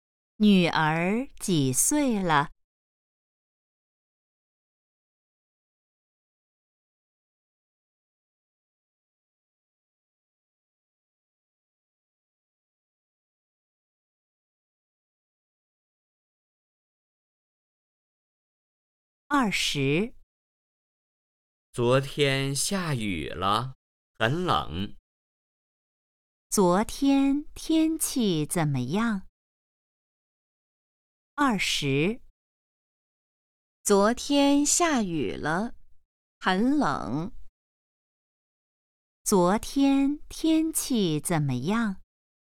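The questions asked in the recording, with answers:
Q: 昨天天气怎么样?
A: 下雨了,很冷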